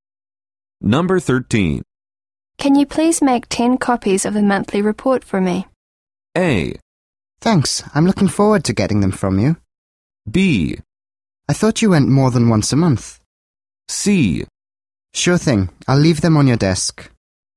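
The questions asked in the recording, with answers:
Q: Can you please make 10 copies of the monthly report for me?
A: C: Sure thing. I'll leave them on your desk.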